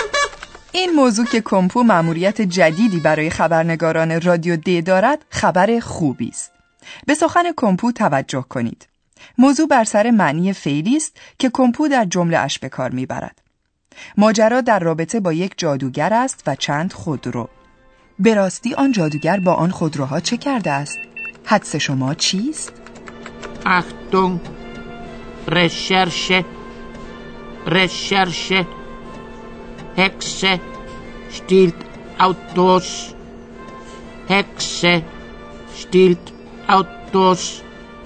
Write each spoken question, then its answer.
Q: به راستی آن جادوگر با آن خودروها چه کرده است؟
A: کسی با سوء استفاده از ایام کارناوال خود را به شکل یک جادوگر درآورده تا بدین طریق بتواند خودروی مردم را به سرقت ببرد.